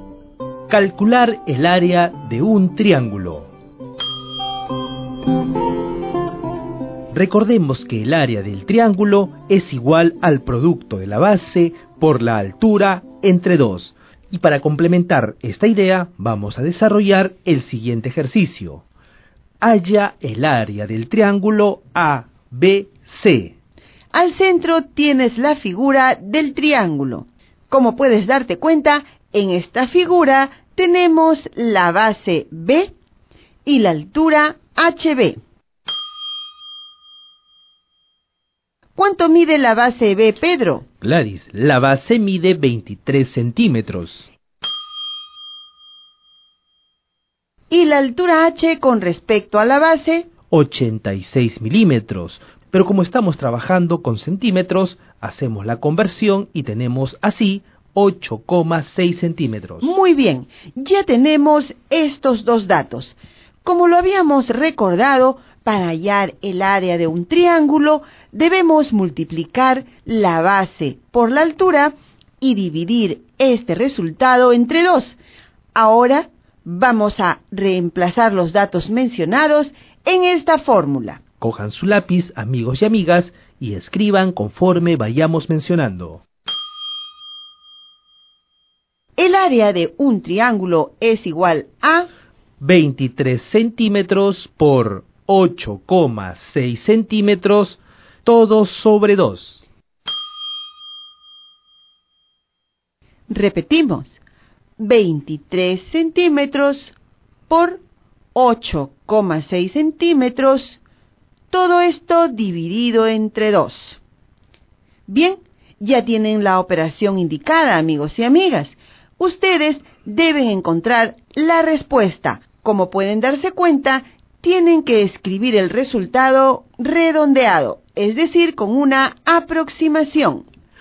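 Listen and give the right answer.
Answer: 98,9 cm2 (23 × 8,6 / 2)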